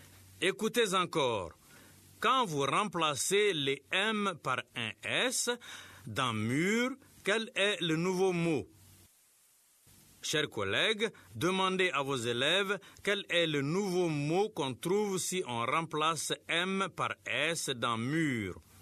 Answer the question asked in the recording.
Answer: Monsieur, c'est sûr.